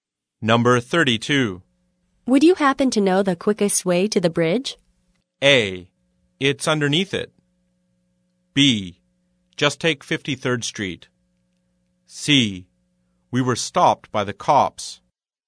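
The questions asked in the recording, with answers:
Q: Would you happen to know the quickest way to the bridge?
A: B: Just take 53rd Street.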